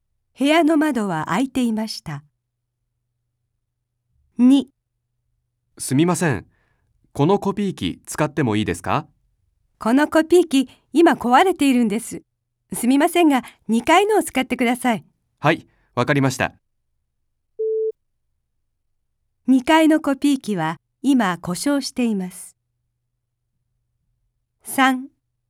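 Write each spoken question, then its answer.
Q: 2階のコピー機は今故障しています。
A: 正しくない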